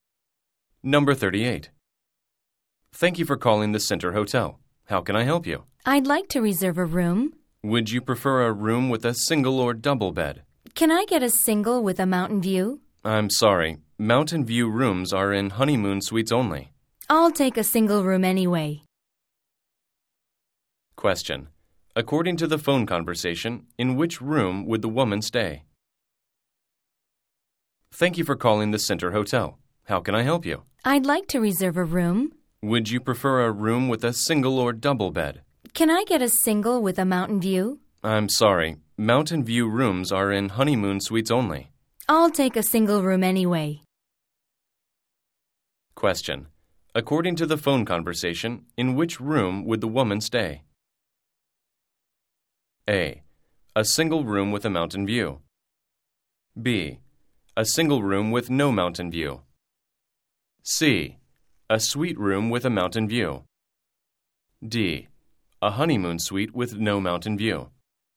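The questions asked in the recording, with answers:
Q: According to the phone conversation, in which room would the woman stay?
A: B: A single room with no mountain view.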